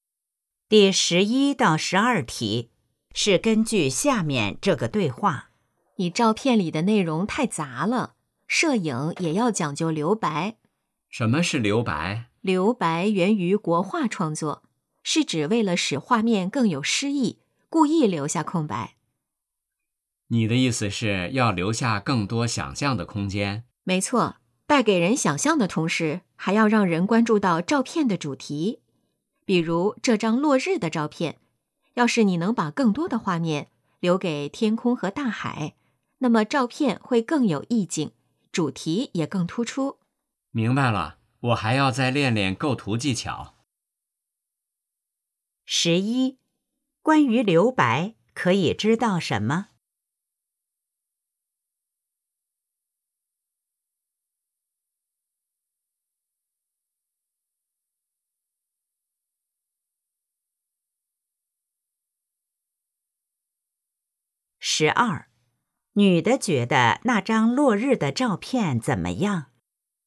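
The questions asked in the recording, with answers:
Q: 关于留白,可以知道什么?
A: 源于国画,能给人想象空间并突出主题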